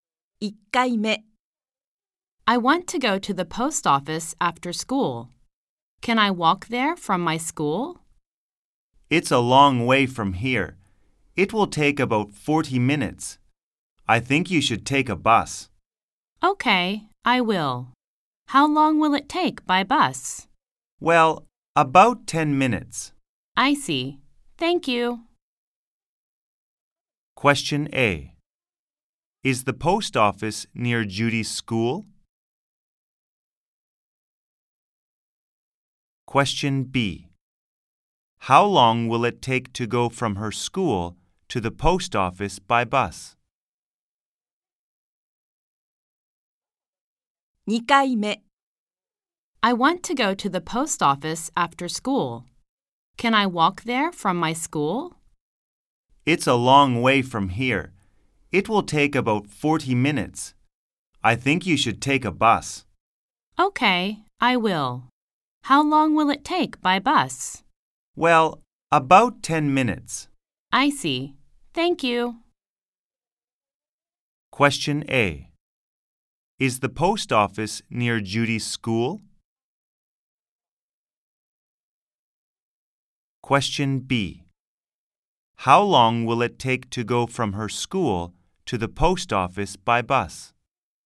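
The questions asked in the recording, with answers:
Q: Question A. Is the post office near Judy's school?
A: No, it isn't.

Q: Question B. How long will it take to go from her school to the post office by bus?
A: About 10 minutes.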